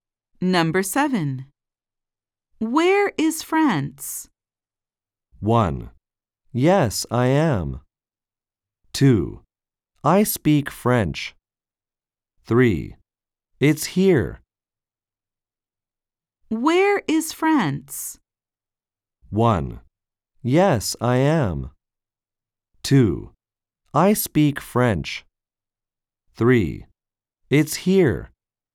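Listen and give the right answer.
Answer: 3: It's here.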